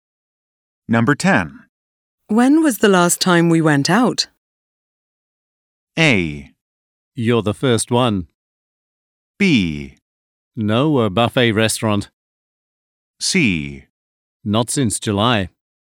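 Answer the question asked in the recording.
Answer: C: Not since July.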